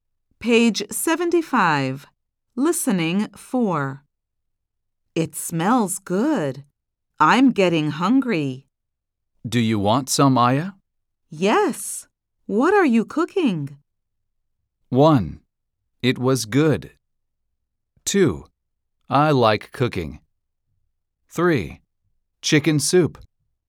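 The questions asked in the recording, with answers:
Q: What are you cooking?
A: 3: Chicken soup.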